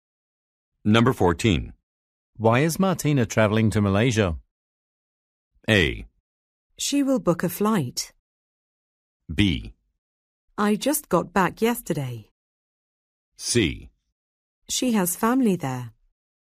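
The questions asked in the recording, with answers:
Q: Why is Martina traveling to Malaysia?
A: C: She has family there.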